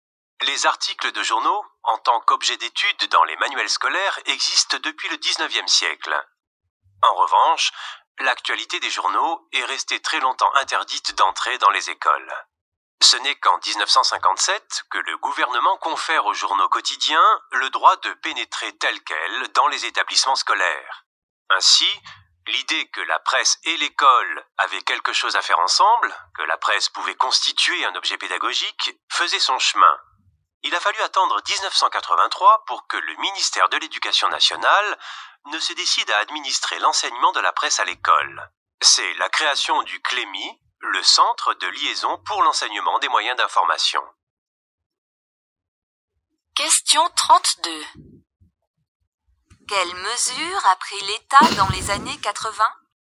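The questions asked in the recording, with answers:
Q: Quelles mesures a pris l'État dans les années 80 ?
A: Il a créé le CLEMI pour organiser l'enseignement de la presse à l'école (1983).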